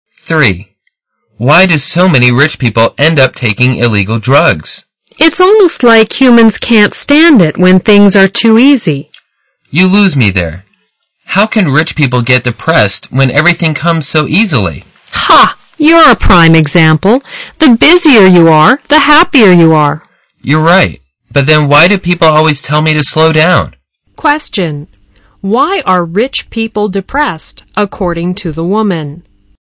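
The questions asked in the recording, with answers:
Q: Why are rich people depressed, according to the woman?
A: Their lives are too easy; they have nothing to keep them busy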